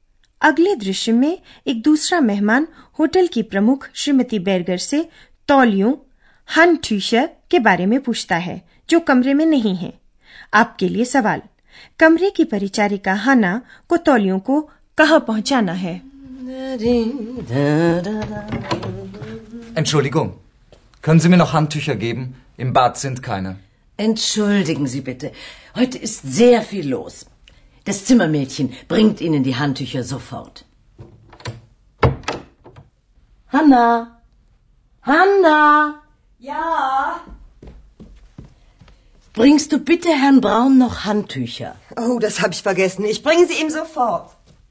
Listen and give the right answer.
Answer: Hanna को Tolio को श्री Braun ke कमरे में पहुंचाना hai.